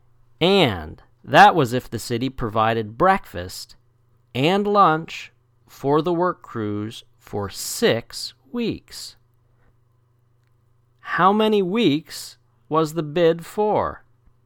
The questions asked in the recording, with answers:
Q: How many weeks was the bid for?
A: 6. 6 weeks.